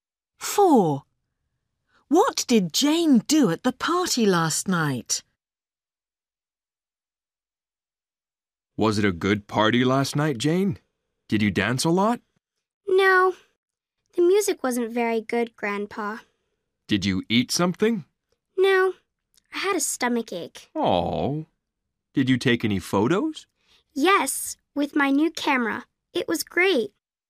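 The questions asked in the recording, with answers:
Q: What did Jane do at the party last night?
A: She took photos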